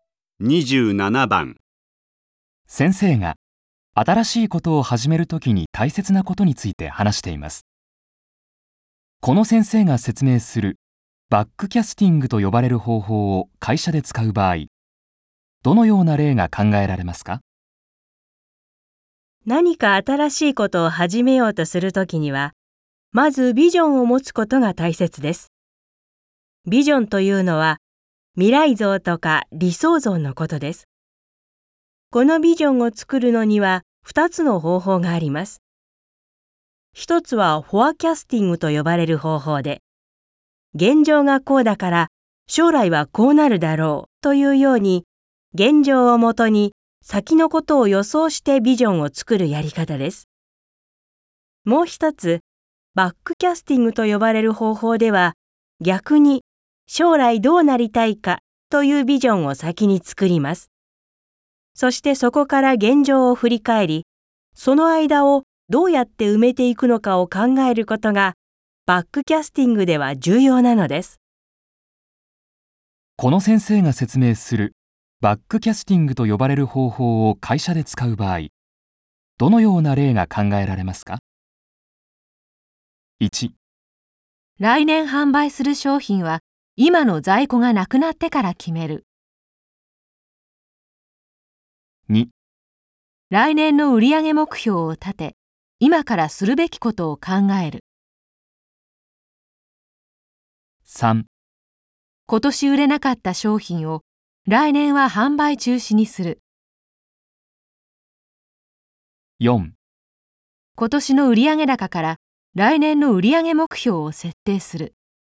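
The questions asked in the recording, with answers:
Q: この先生が説明するバックキャスティングと呼ばれる方法を会社で使う場合、どのような例が考えられますか?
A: 2: 来年の売上目標を立て、今からするべきことを考える。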